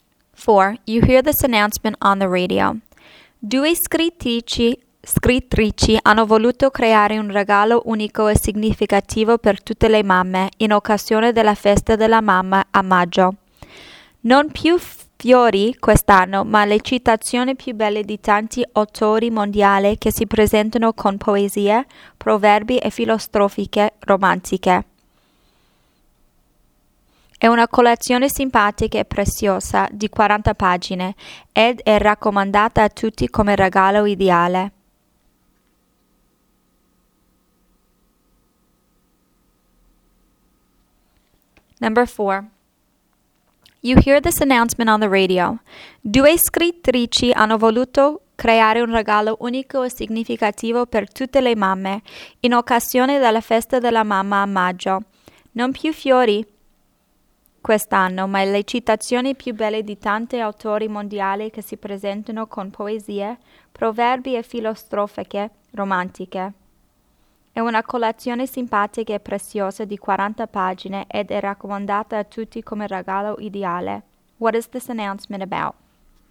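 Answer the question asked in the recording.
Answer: A book of quotations (poems, proverbs) as a Mother's Day gift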